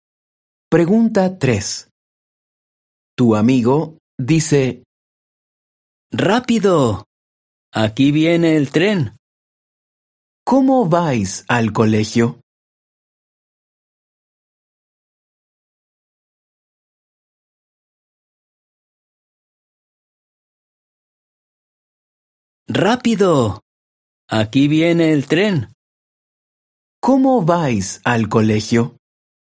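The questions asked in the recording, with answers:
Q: ¿Cómo vais al colegio?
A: En tren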